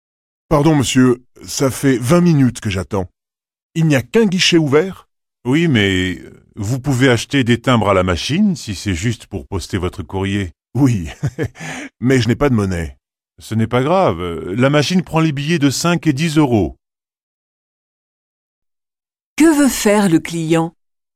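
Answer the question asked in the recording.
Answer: Acheter des timbres pour poster son courrier.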